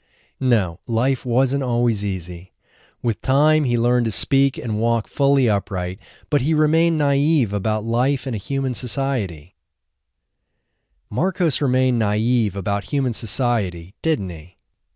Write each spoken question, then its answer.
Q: Marcos remained naive about human society, didn't he?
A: Yes, Marcos remained naive about human society.